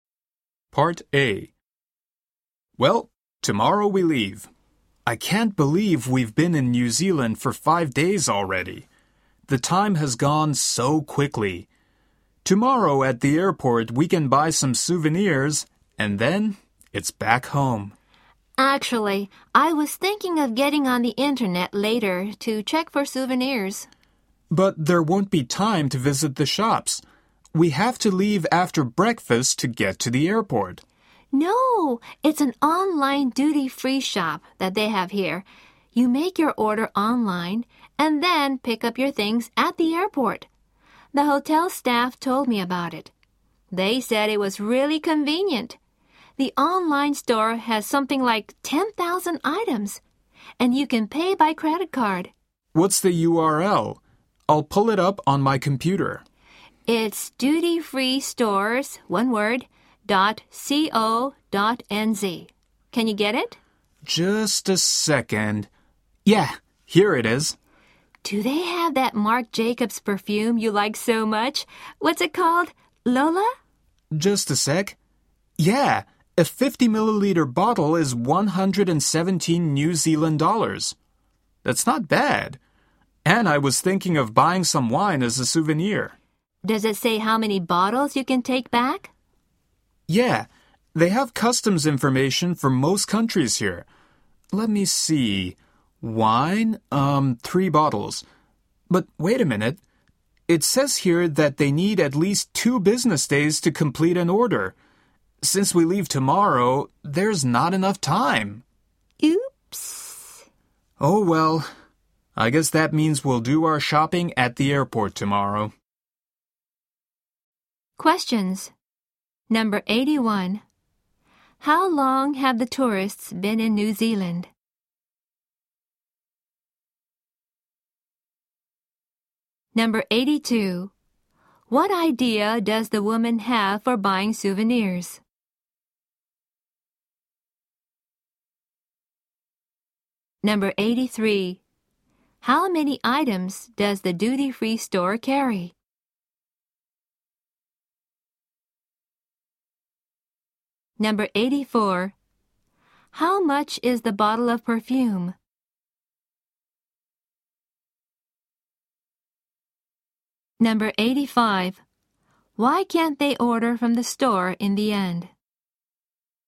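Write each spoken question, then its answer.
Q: How long have the tourists been in New Zealand?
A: 5 days

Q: What idea does the woman have for buying souvenirs?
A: Order from an online duty-free shop and pick up at the airport

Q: How many items does the duty-free store carry?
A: About 10,000

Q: How much is the bottle of perfume?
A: 117 New Zealand dollars

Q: Why can't they order from the store in the end?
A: Orders need at least 2 business days and they leave tomorrow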